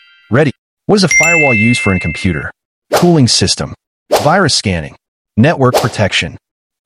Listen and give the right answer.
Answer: The correct answer is network protection.